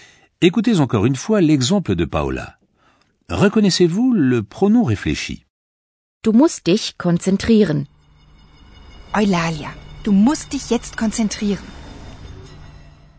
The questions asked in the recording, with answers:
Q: Reconnaissez-vous le pronom réfléchi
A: Le pronom réfléchi est dich.